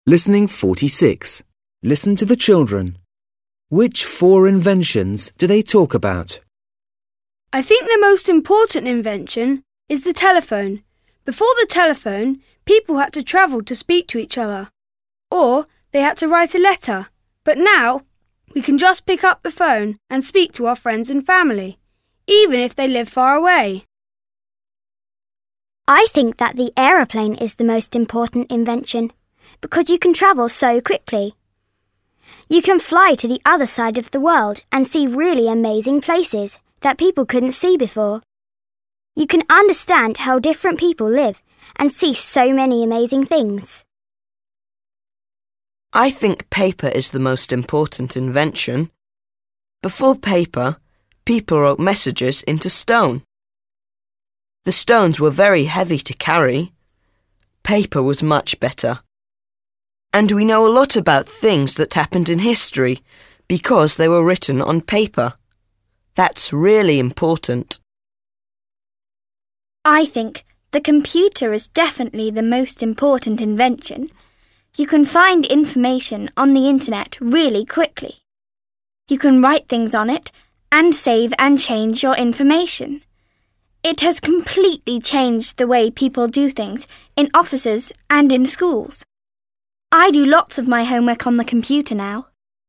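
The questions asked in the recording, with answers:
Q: Which four inventions do they talk about?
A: the telephone, the airplane, paper and the computer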